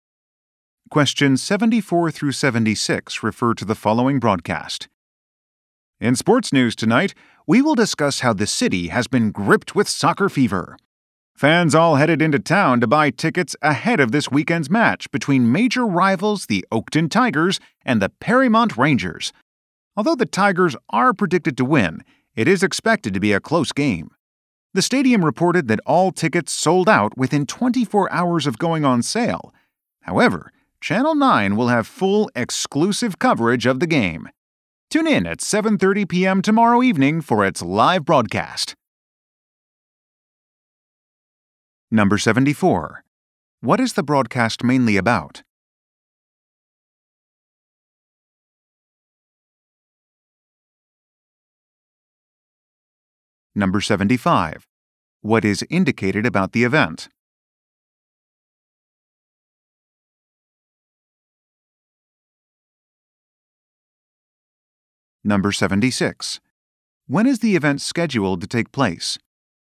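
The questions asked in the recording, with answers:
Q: What is the broadcast mainly about?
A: An upcoming soccer match

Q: What is indicated about the event?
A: Tickets are sold out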